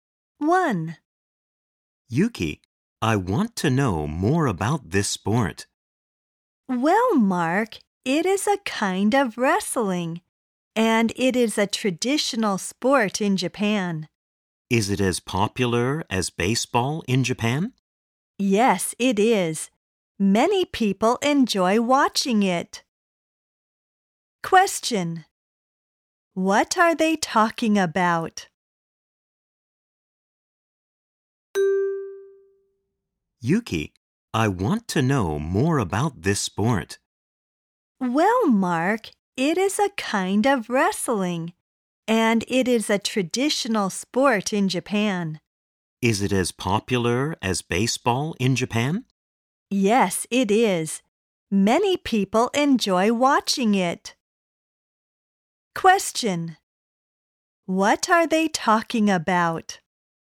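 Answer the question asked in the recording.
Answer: Sumo (a traditional Japanese wrestling sport)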